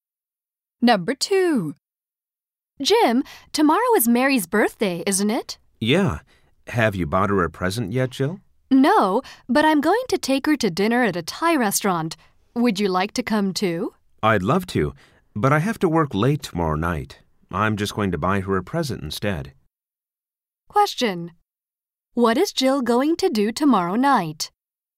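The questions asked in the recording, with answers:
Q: What is Jill going to do tomorrow night?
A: Take Mary to dinner at a Thai restaurant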